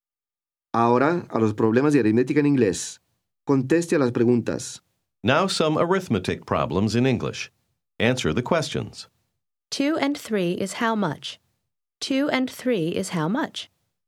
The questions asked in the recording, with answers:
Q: 2 and 3 is how much? 2 and 3 is how much?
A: 5. 2 and 3 is 5.